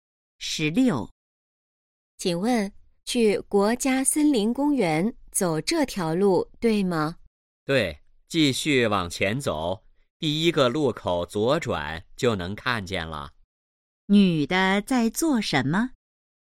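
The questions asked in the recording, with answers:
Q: 女的在做什么?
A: 问路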